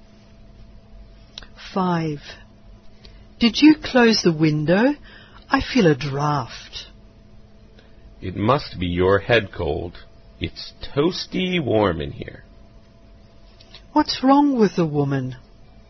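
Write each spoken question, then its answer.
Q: What's wrong with the woman?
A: She has a head cold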